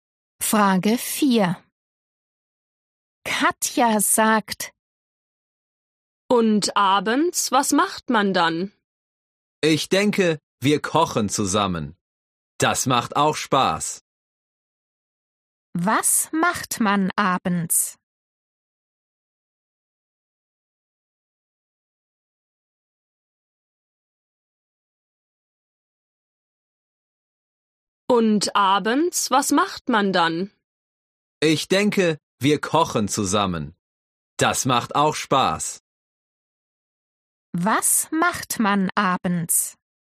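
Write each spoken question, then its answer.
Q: Was macht man abends?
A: Man kocht zusammen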